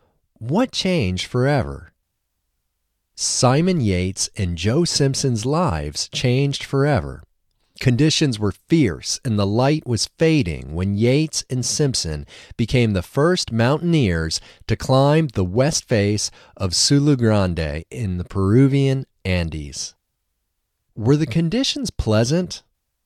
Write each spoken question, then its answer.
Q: Were the conditions pleasant?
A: No, the conditions weren't pleasant.